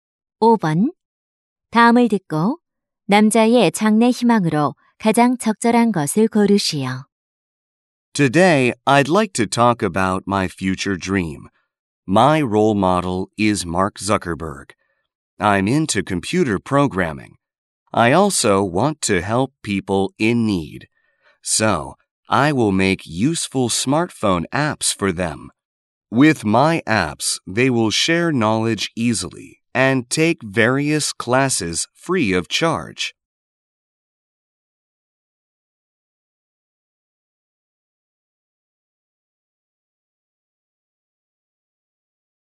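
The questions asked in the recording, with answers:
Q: 다음을 듣고 남자의 장래 희망으로 가장 적절한 것을 고르시오.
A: 앱 개발자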